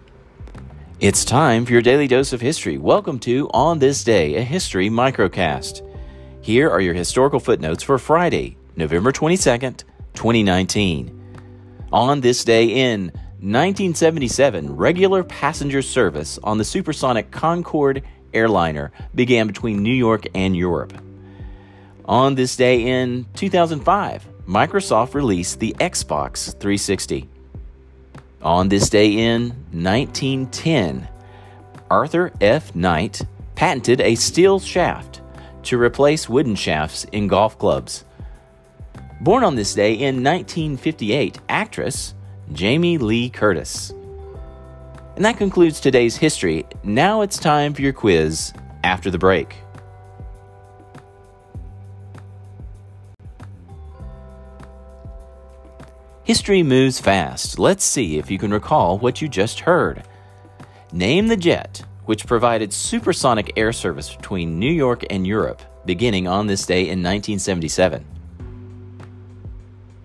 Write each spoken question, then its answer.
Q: Name the jet which provided supersonic air service between New York and Europe beginning on this day in 1977.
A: Answer, the Concorde.